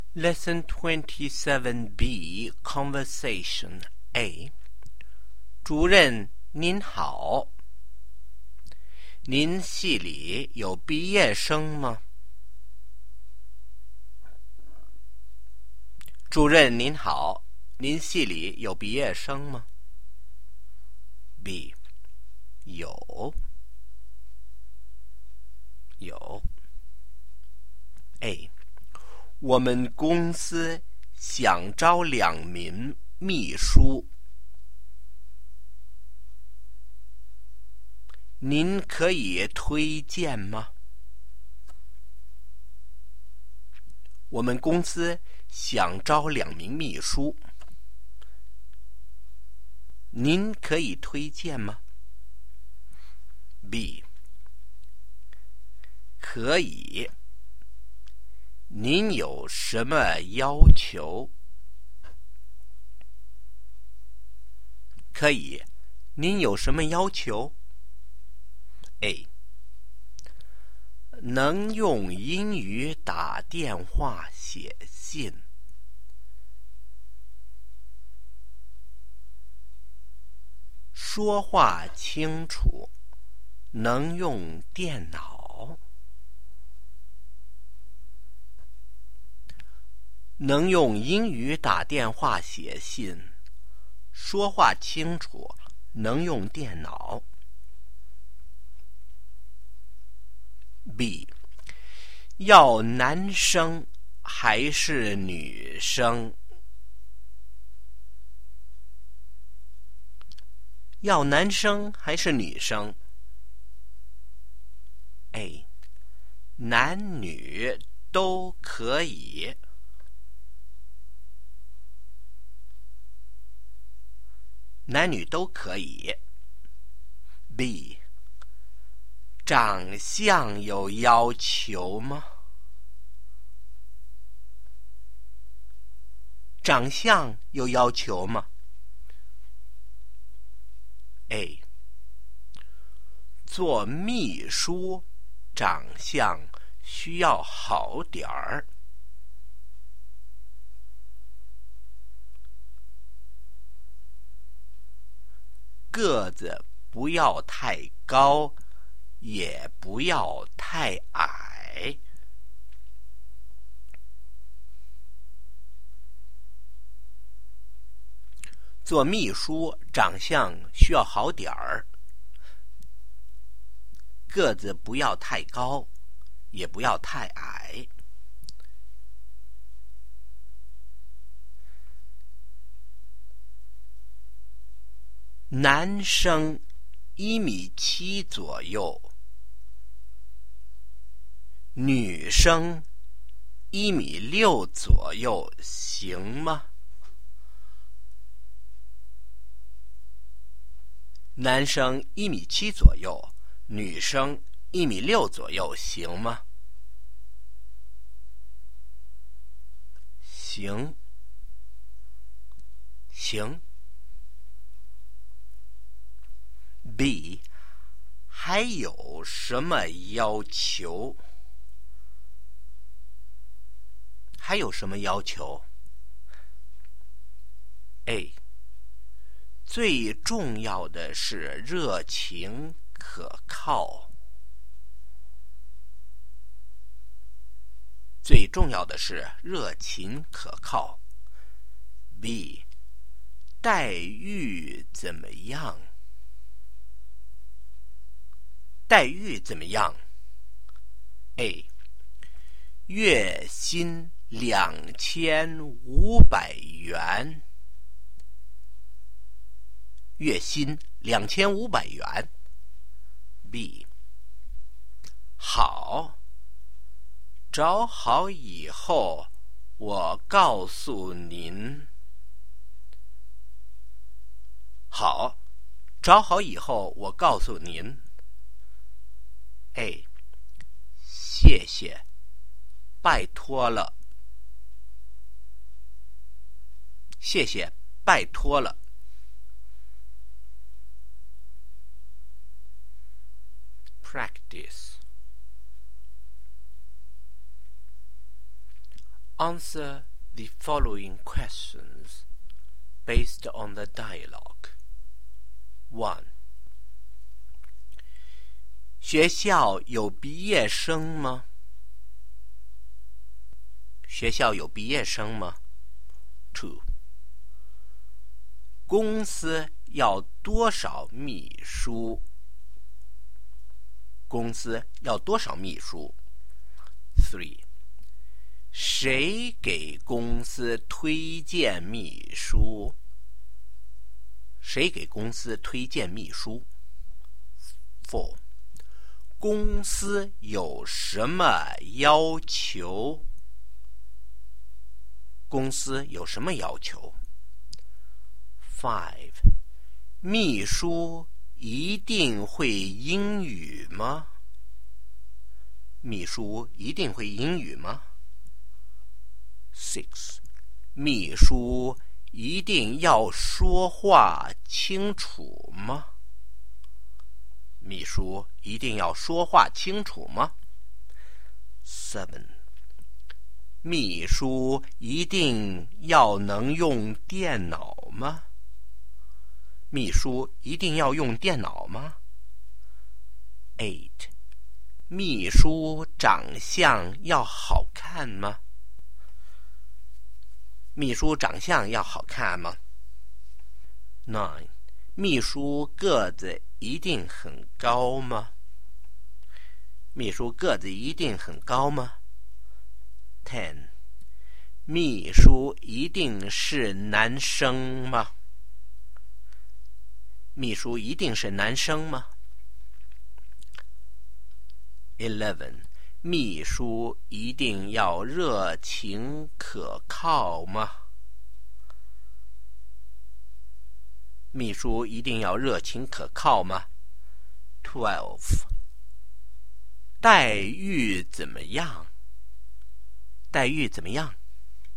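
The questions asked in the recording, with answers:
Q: 公司要多少秘书?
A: 两名

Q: 谁给公司推荐秘书?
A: 主任

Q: 公司有什么要求?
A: 能用英语打电话写信,说话清楚,能用电脑,长相好点儿,热情可靠

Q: 秘书一定会英语吗?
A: 是,要能用英语打电话写信

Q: 秘书长相要好看吗?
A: 要好点儿

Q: 秘书个子一定很高吗?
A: 不,不要太高也不要太矮

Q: 秘书一定是男生吗?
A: 不,男女都可以

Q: 秘书一定要热情可靠吗?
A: 是,最重要的是热情可靠

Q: 待遇怎么样?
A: 月薪2500元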